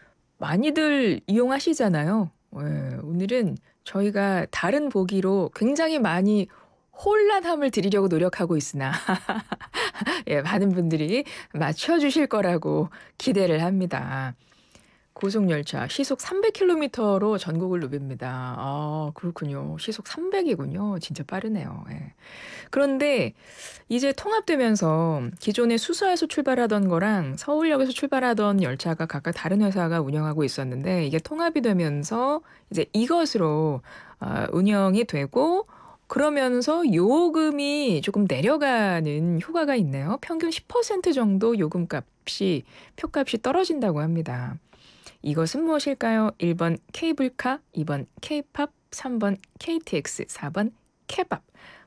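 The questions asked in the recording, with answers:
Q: 이것은 무엇일까요? 1번 케이블카, 2번 케이팝, 3번 KTX, 4번 케밥.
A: 3: KTX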